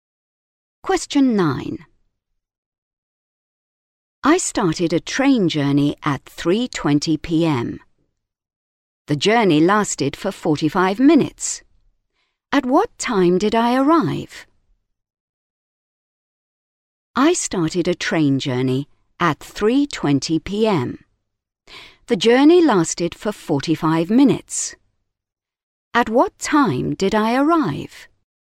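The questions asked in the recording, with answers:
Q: At what time did I arrive?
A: 4:05 p.m.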